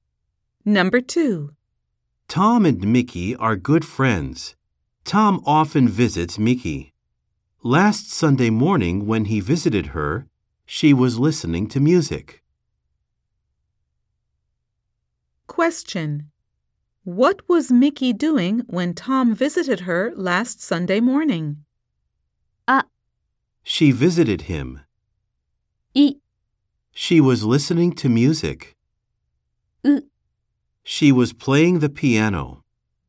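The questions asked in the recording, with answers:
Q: What was Mickey doing when Tom visited her last Sunday morning?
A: B: She was listening to music.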